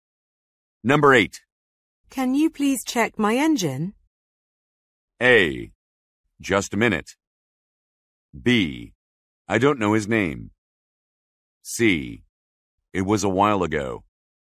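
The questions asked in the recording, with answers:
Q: Can you please check my engine?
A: A: Just a minute.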